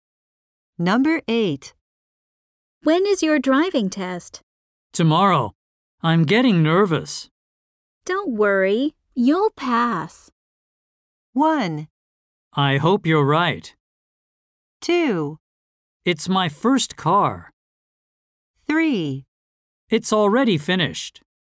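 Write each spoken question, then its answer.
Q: Don't worry, you'll pass.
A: 1: I hope you're right.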